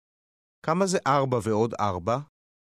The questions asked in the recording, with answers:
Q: כמה זה 4 ועוד 4?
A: 8. 8.